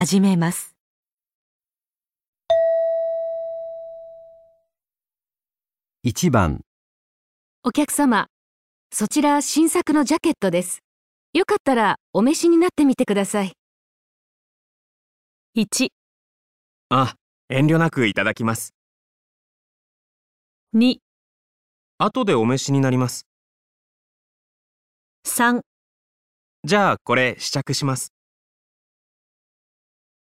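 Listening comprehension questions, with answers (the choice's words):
お客様、そちらは新作のジャケットです。 よかったらお召しになってみてください。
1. あ、遠慮なくいただきます。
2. 後でお召しになります。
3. じゃあこれ、試着します。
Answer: じゃあこれ、試着します。

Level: 【N1 第1回】聴解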